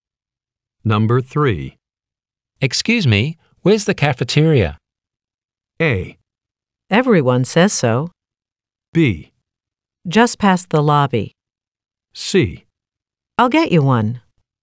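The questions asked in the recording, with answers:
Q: Excuse me, where's the cafeteria?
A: B: Just past the lobby.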